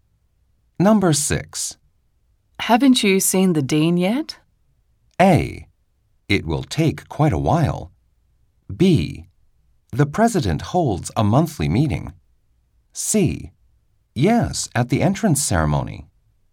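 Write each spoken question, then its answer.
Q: Haven't you seen the dean yet?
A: C: Yes, at the entrance ceremony.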